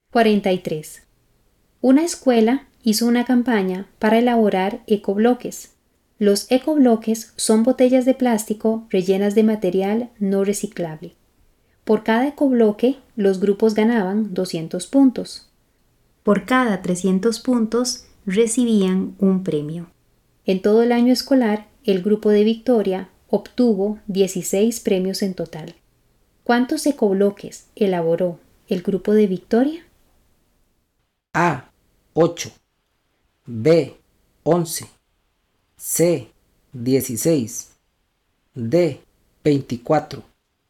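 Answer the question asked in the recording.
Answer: D: 24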